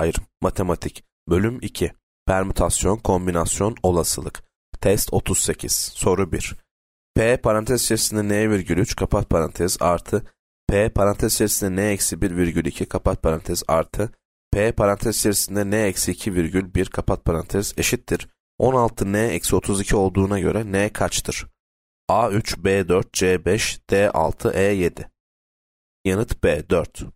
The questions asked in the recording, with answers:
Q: P parantez içerisinde N virgül 3 kapat parantez artı P parantez içerisinde N eksi 1 virgül 2 kapat parantez artı P parantez içerisinde N eksi 2 virgül 1 kapat parantez eşittir 16 N eksi 32 olduğuna göre N kaçtır?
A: Yanıt B 4.